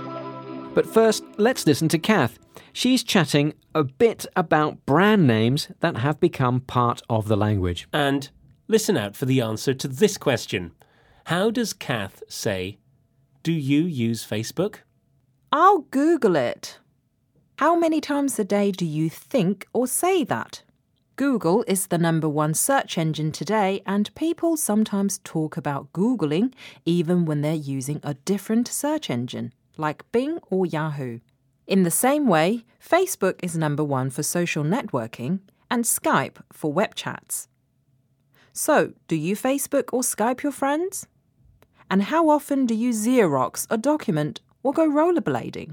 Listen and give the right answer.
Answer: she said, do you Facebook your friends?